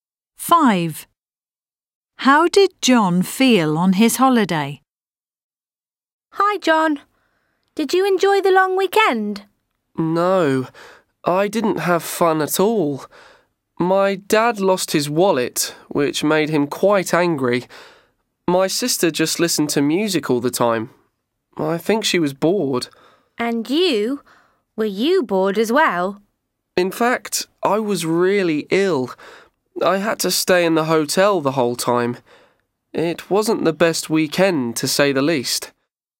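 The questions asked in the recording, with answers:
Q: How did John feel on his holiday?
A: Ill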